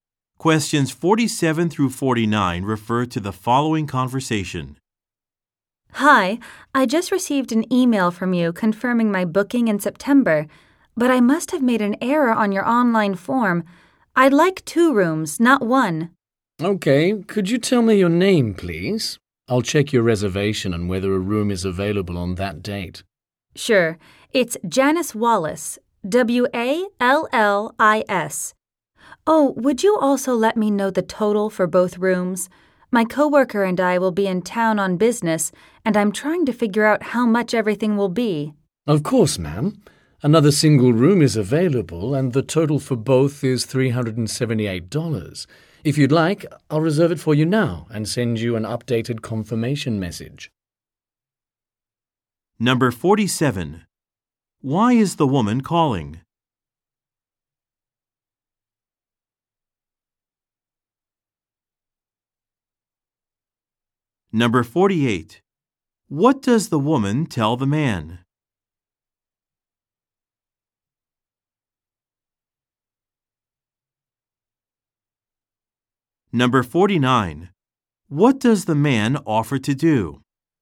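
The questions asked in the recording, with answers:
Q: Why is the woman calling?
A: To change her booking to two rooms

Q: What does the man offer to do?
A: Reserve the room and send an updated confirmation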